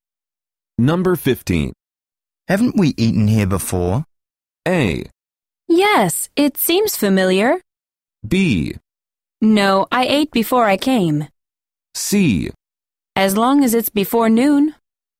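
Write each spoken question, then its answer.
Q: Haven't we eaten here before?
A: A: Yes, it seems familiar.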